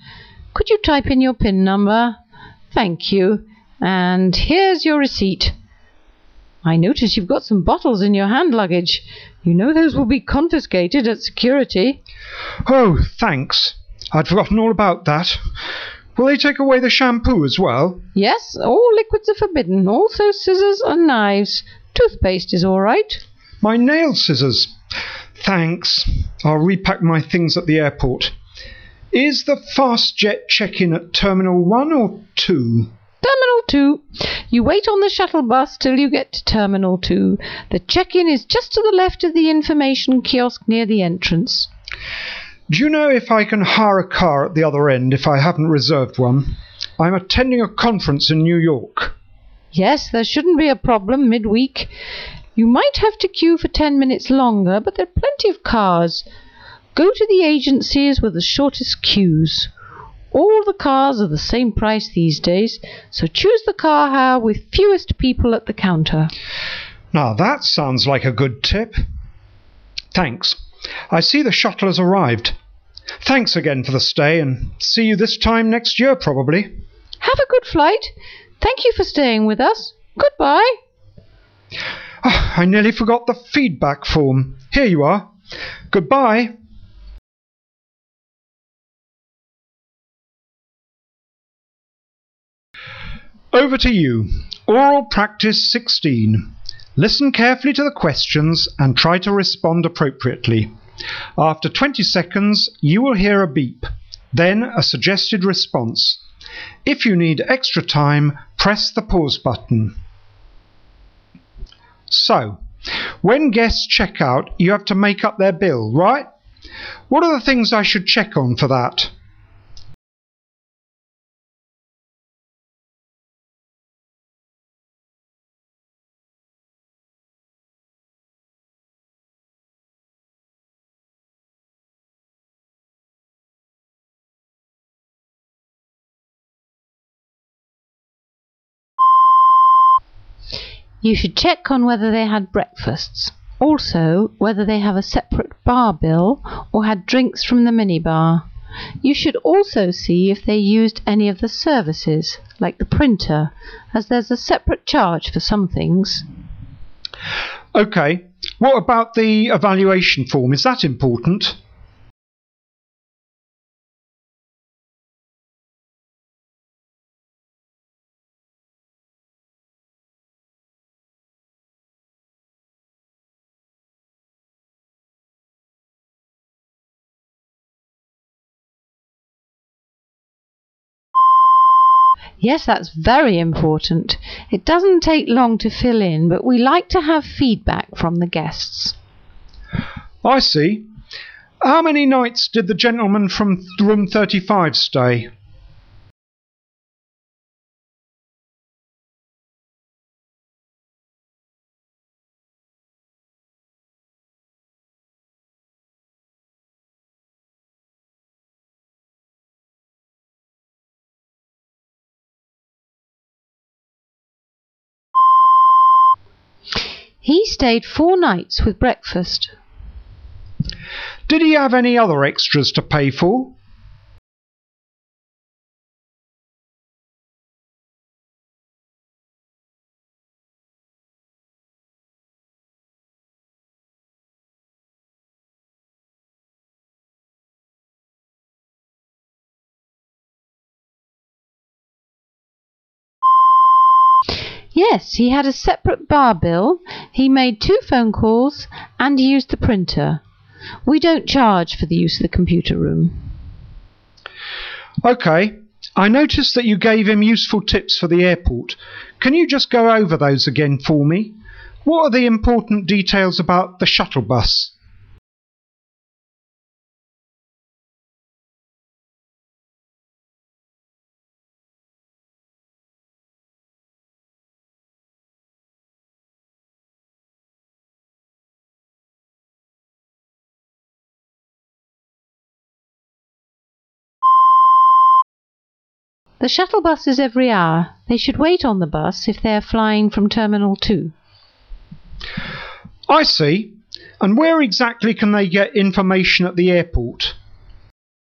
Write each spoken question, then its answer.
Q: And where exactly can they get information at the airport?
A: There's an information kiosk near the entrance.